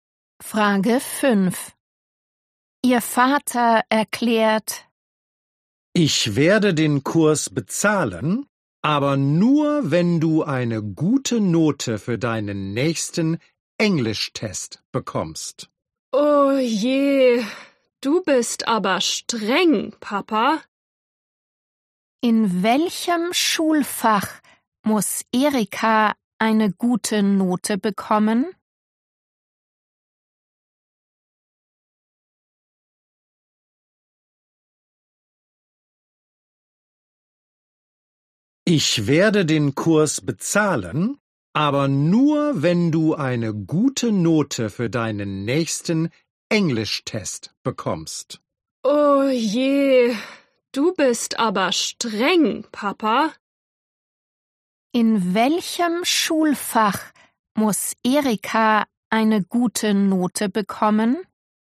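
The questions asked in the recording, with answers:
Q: In welchem Schulfach muss Erika eine gute Note bekommen?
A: Englisch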